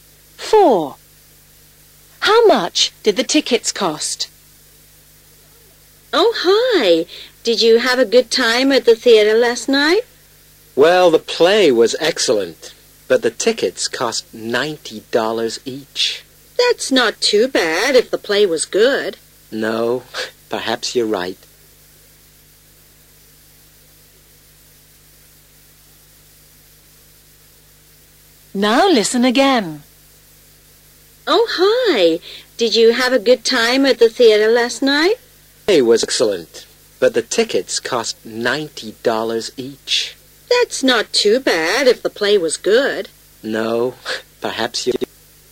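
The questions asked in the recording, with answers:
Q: How much did the tickets cost?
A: $90 each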